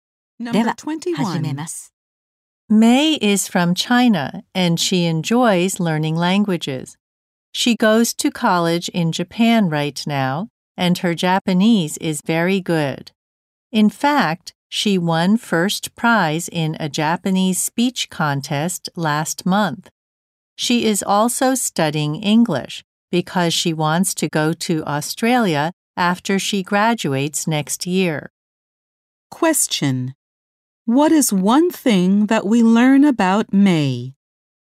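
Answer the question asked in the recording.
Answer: She won a Japanese speech contest.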